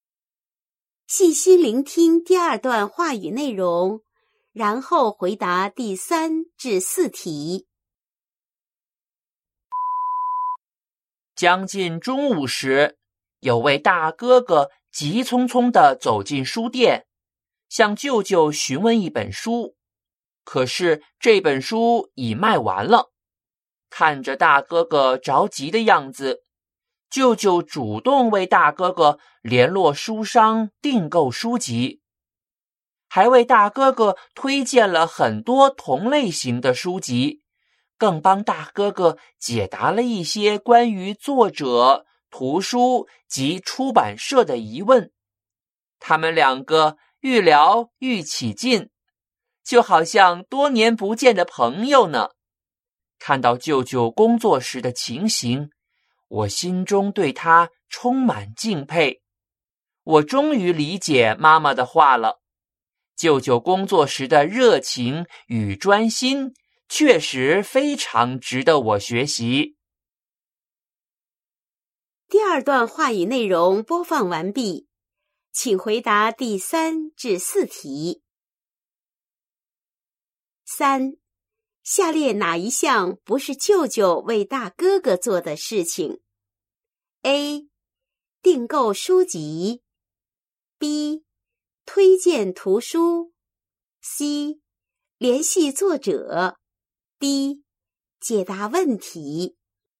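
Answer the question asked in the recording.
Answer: C: 联系作者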